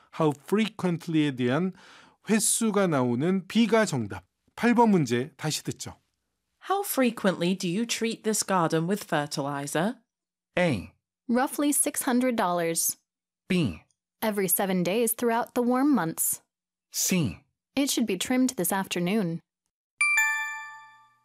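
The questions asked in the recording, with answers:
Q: How frequently do you treat this garden with fertilizer?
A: B: Every 7 days throughout the warm months.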